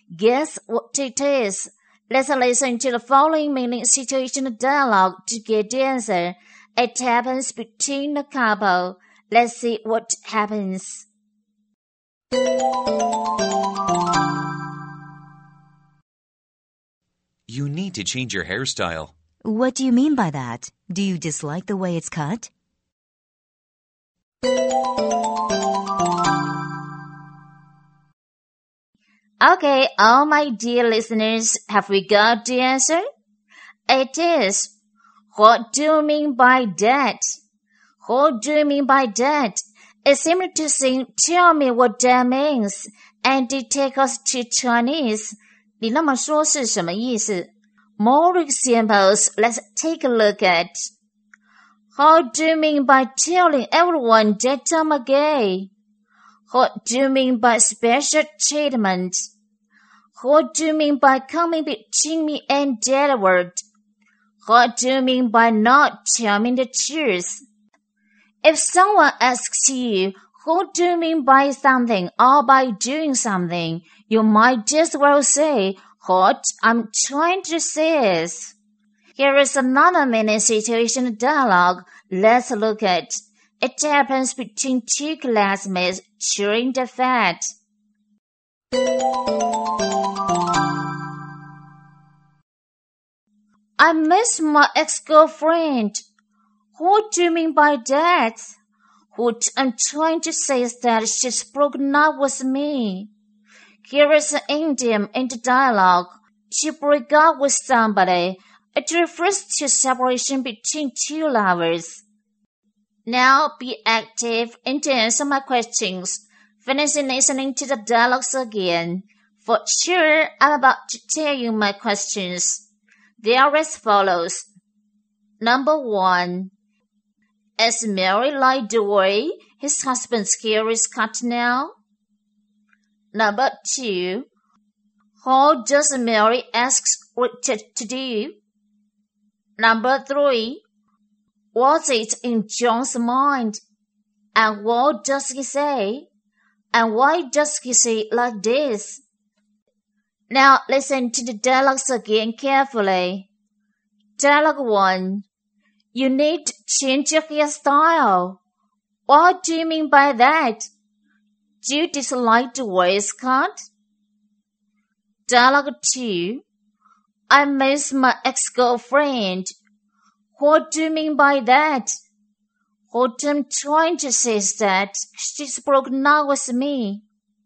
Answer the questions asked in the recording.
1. No, she didn't.
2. She asked him to change his style.
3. His ex-girlfriend is in his mind.